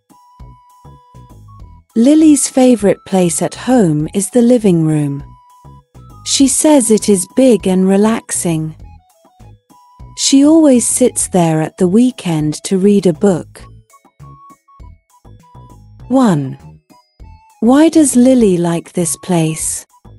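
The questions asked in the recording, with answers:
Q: Why does Lily like this place?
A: It is big and relaxing.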